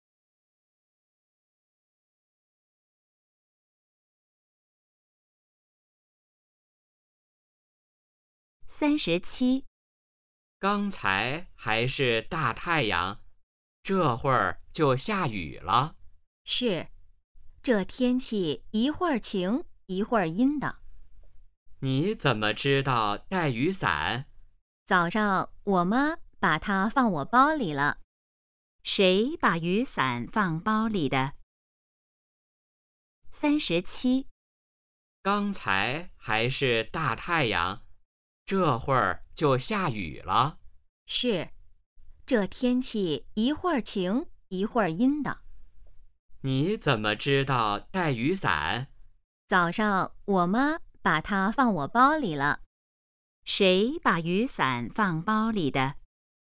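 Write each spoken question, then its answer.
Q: 谁把雨伞放包里的?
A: 妈妈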